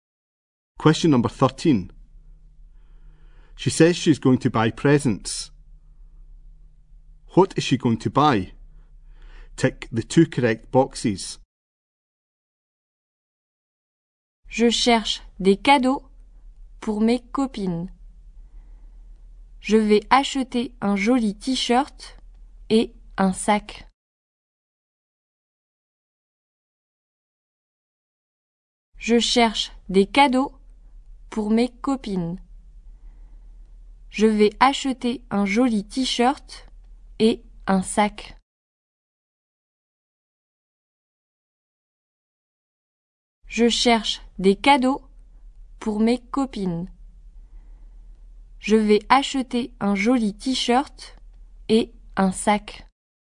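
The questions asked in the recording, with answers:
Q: What is she going to buy?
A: A nice T-shirt and a bag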